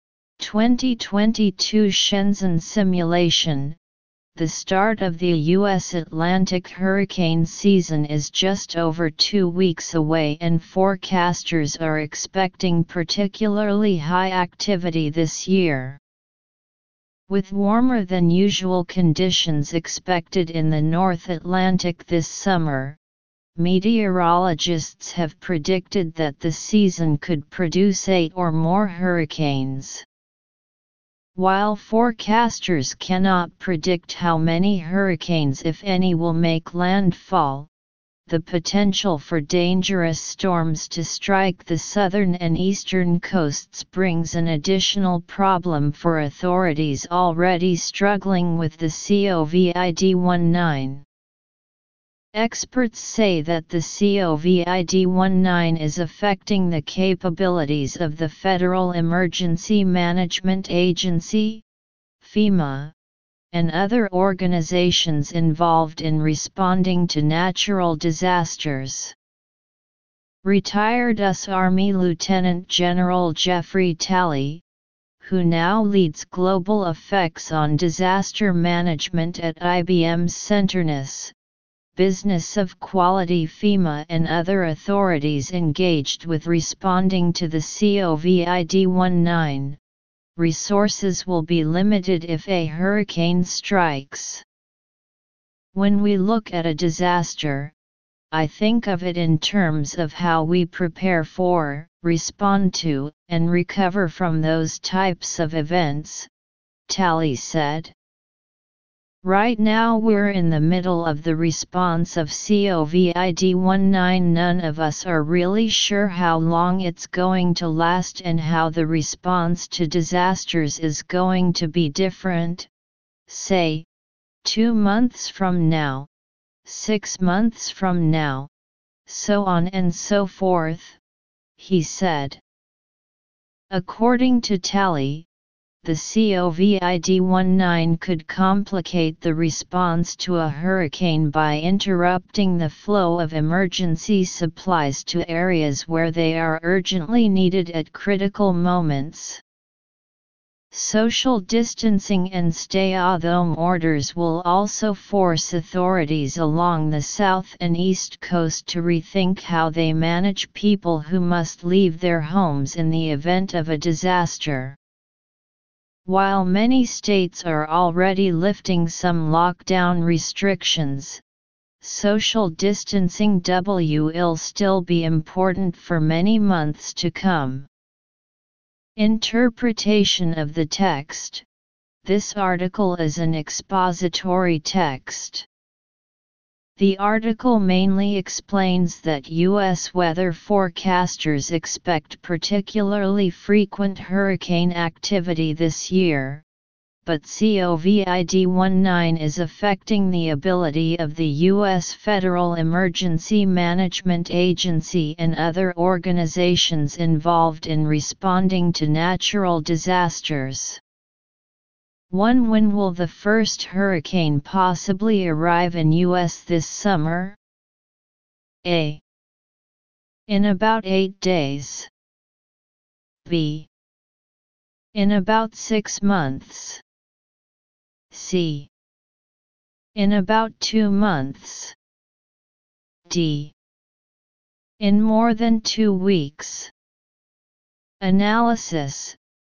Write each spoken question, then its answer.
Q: When will the first hurricane possibly arrive in U.S. this summer?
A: Choose D to understand the details of the questions.